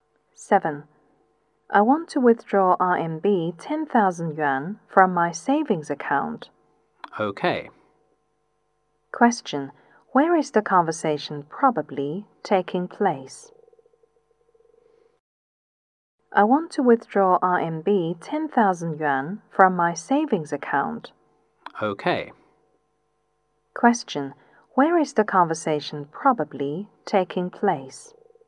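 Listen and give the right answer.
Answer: At a bank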